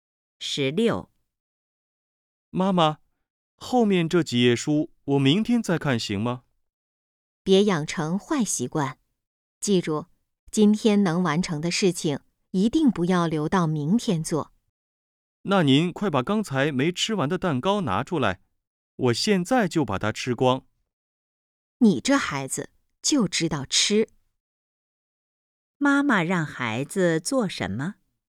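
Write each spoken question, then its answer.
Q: 妈妈让孩子做什么?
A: 今天把后面几页书看完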